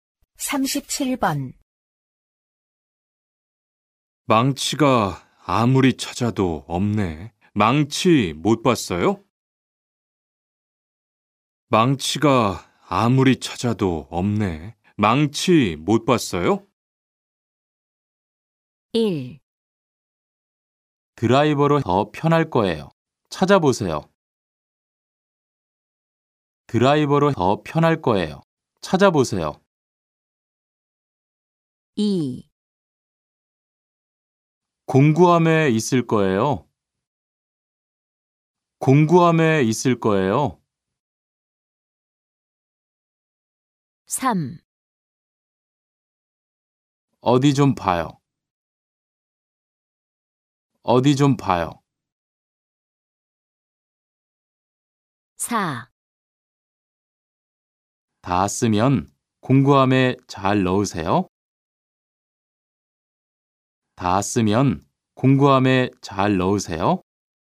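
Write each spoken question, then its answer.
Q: 망치가 아무리 찾아도 없네. 망치 못 봤어요?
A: 2: 공구함에 있을 거예요.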